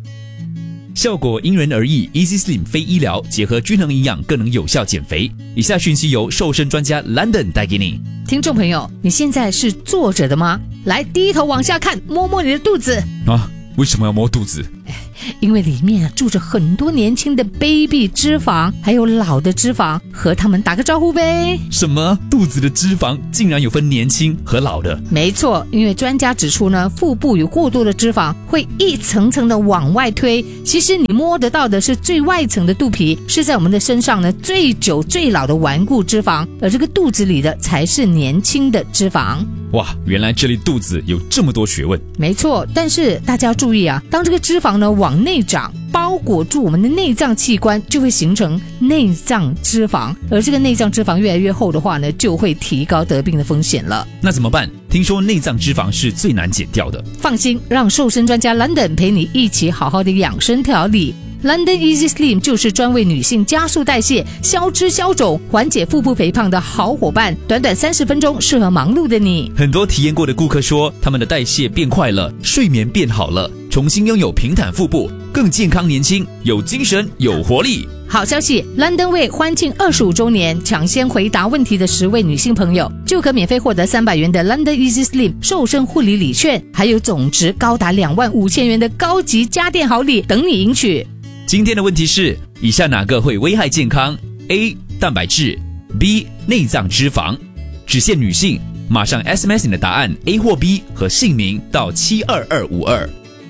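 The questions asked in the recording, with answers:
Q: 今天的问题是,以下哪个会危害健康? A. 蛋白质, B.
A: B: 内脏脂肪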